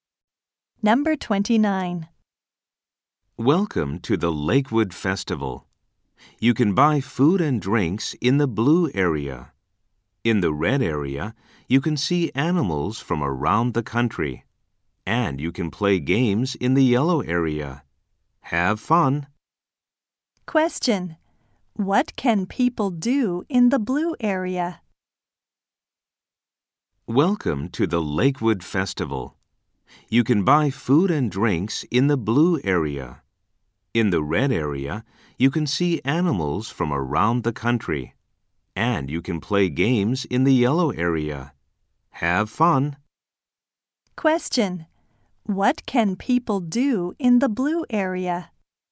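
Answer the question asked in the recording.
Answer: Buy food and drinks.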